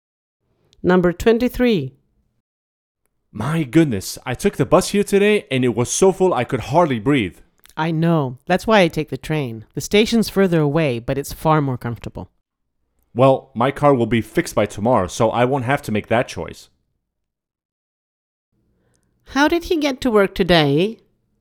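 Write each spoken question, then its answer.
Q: How did he get to work today?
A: By bus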